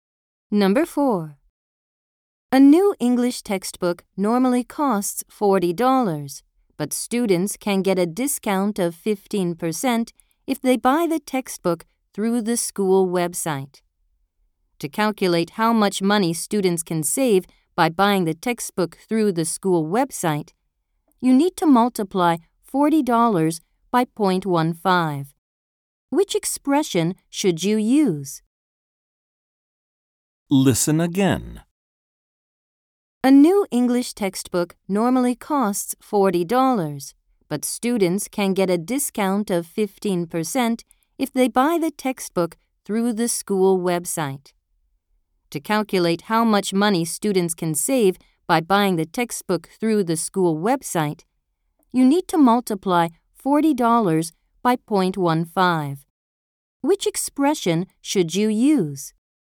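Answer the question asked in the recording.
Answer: 40 × 0.15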